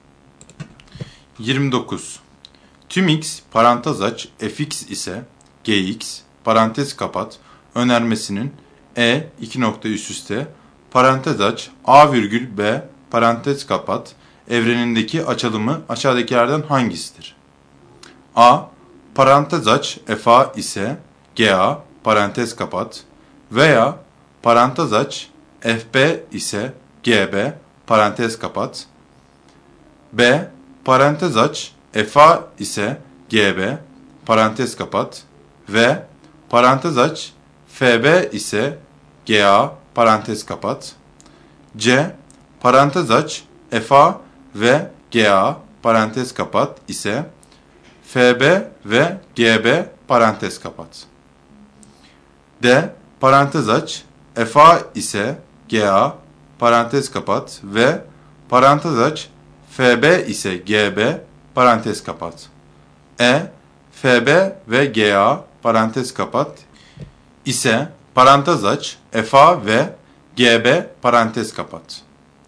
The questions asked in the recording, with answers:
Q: Tüm x parantez aç fx ise gx parantez kapat önermesinin e 2 nokta üst üste parantez aç a virgül b parantez kapat evrenindeki açılımı aşağıdakilerden hangisidir?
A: Doğru cevap D şıkkı.